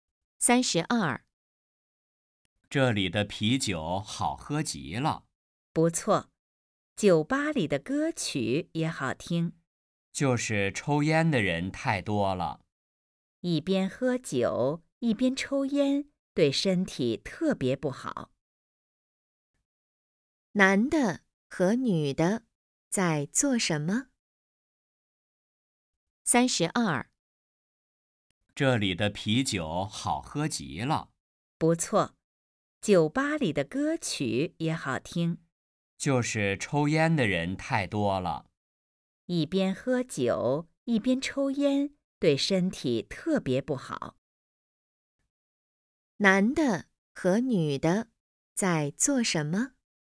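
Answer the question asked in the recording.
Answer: 喝酒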